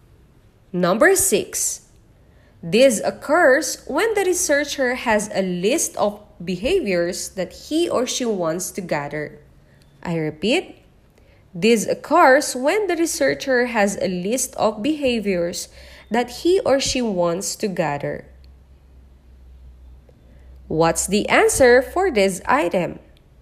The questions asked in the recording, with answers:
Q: What's the answer for this item?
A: It's letter B, observation.